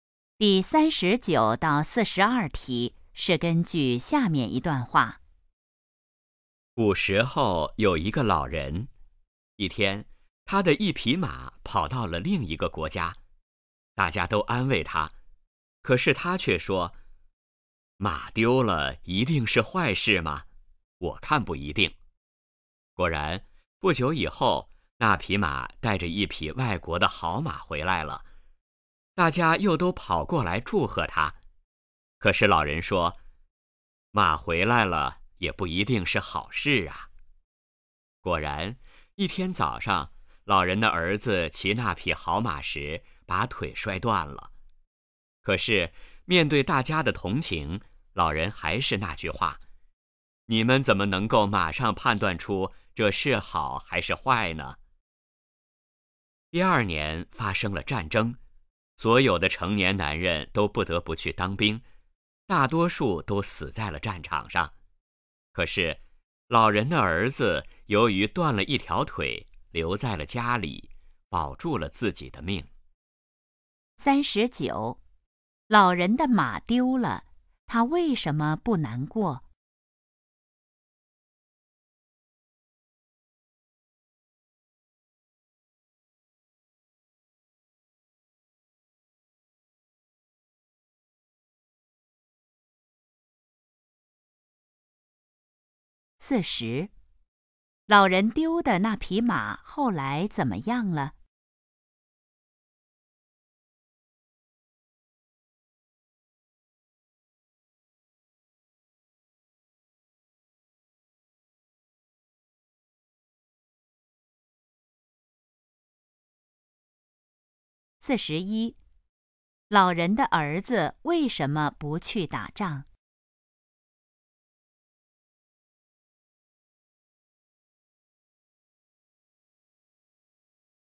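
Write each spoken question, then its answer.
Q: 老人丢的那匹马后来怎么样了?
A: 带着一匹外国的好马回来了

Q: 老人的儿子为什么不去打仗?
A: 他断了一条腿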